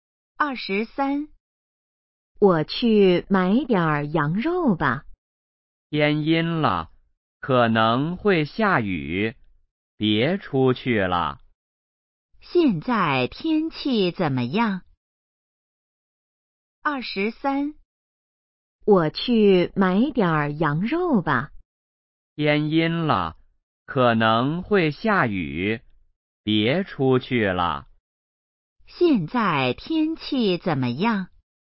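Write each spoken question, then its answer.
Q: 现在天气怎么样?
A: 天阴了,可能会下雨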